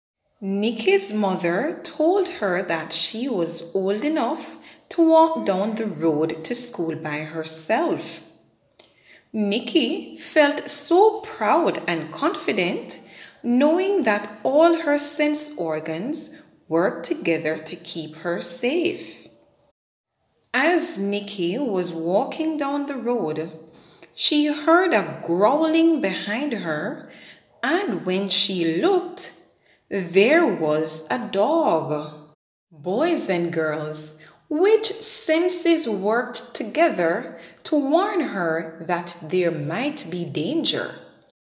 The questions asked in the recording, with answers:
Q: Boys and girls, which senses worked together to warn her that there might be danger?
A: Boys and girls, if your answer was her eyes and her ears, you are correct.